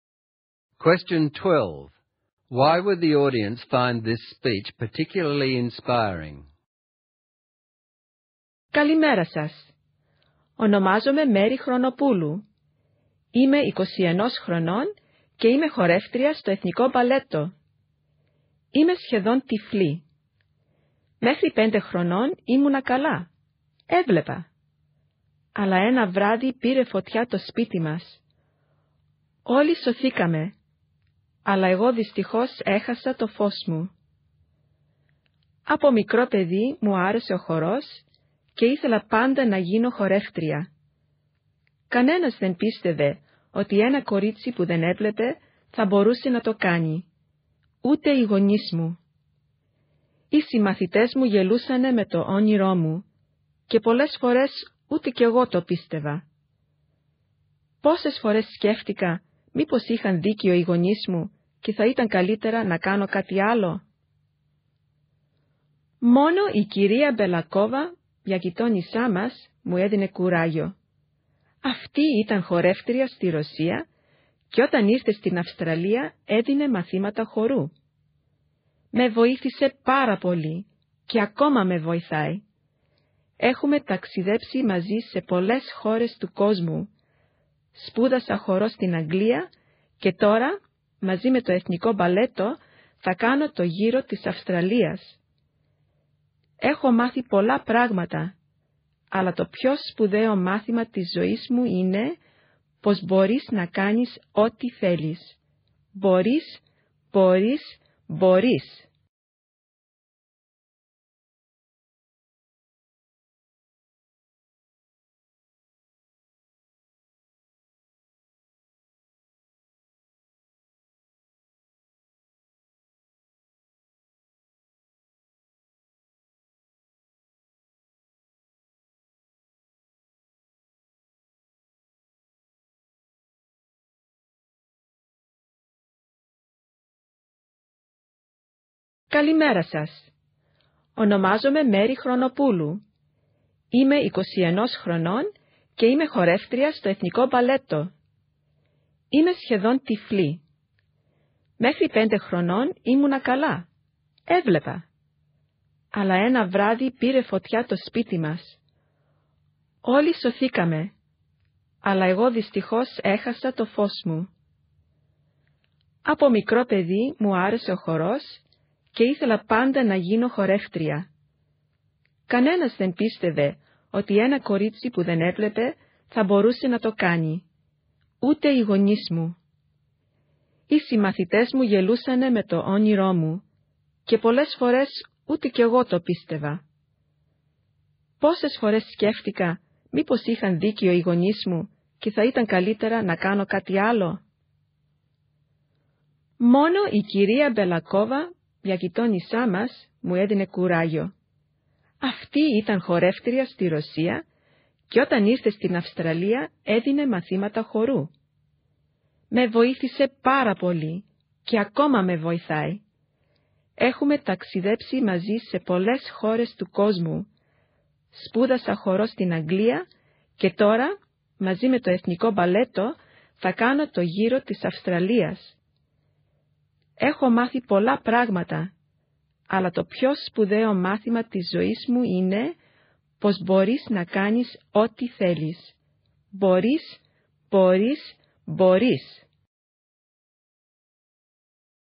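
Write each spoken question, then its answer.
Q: Why would the audience find this speech particularly inspiring?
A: She is almost blind but became a dancer with the National Ballet, even though no one believed she could; her message is that you can do whatever you want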